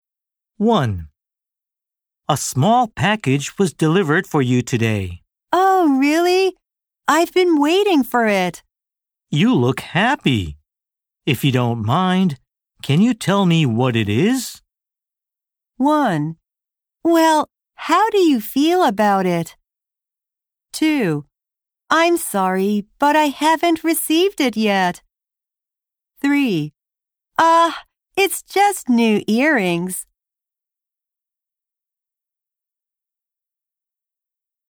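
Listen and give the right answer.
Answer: 3: It's just new earrings.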